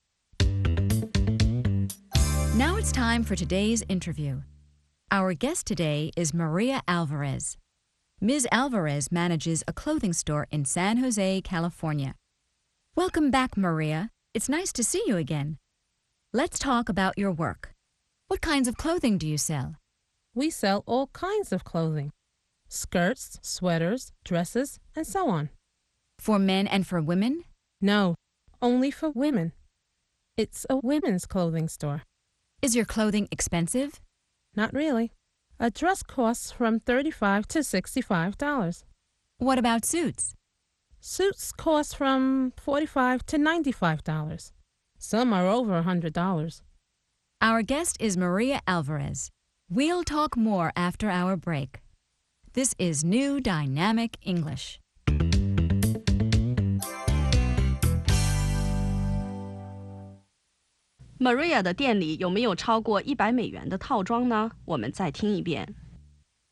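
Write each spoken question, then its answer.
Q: Maria 的店里有没有超过$100的套装呢?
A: 有,有些套装超过$100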